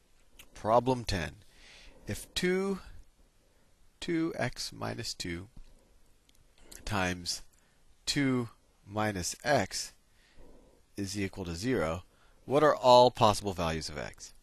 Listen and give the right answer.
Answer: So x could be 1, or x could be 2.